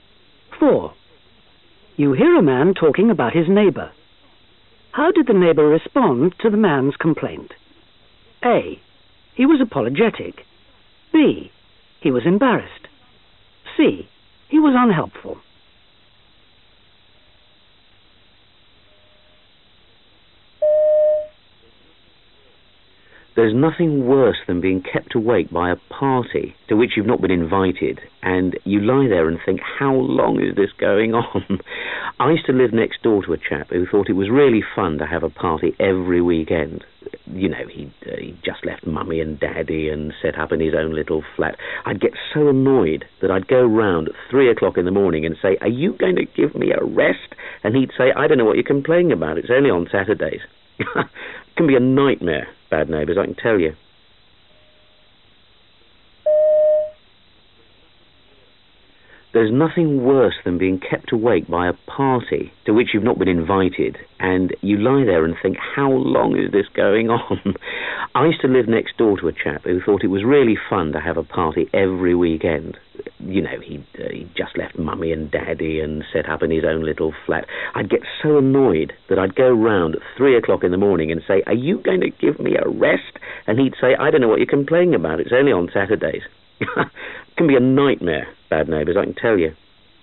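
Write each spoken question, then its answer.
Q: How did the neighbour respond to the man's complaint? A. He was apologetic. B. He was embarrassed. C. He was unhelpful.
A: C: He was unhelpful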